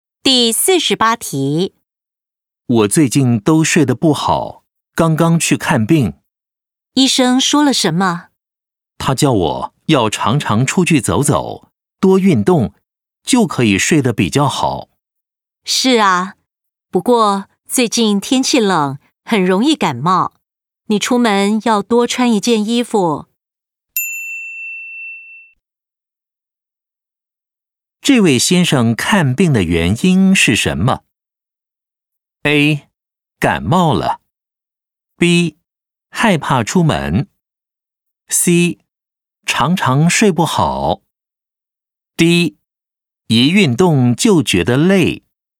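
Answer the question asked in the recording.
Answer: C: 常常睡不好。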